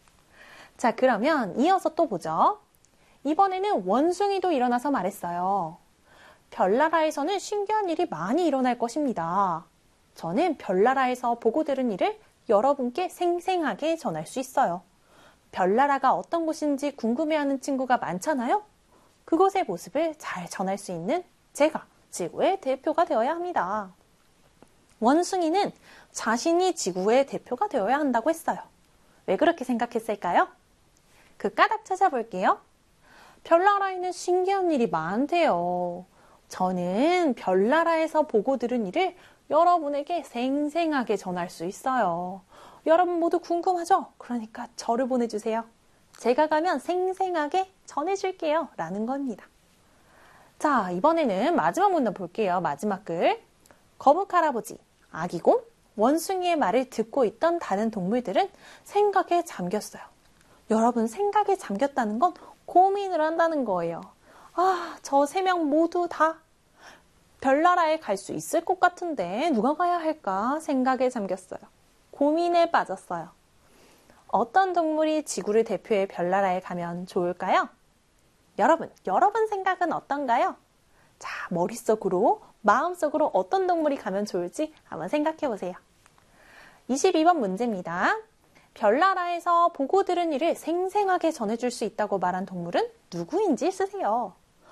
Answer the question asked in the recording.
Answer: 바로 원숭이였죠. 그 친구는 원숭이였어요. 원숭이.